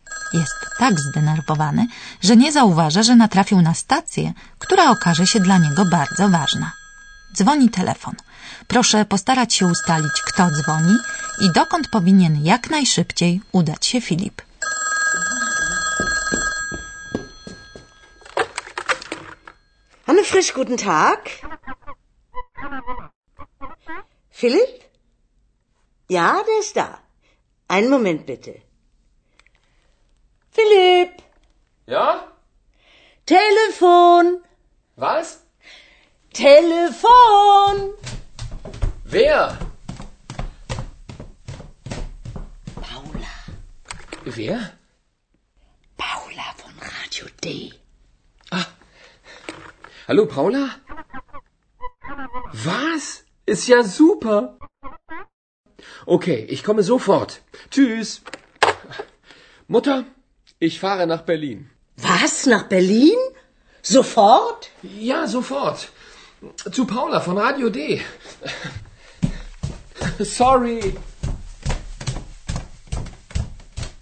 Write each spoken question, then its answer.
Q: Proszę postarać się ustalić, kto dzwoni i dokąd powinien jak najszybciej udać się Filip.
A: Zadzwoniła pewna pani imieniem Paula z Radia D i Filip musi z miejsca wyjechać do Berlina.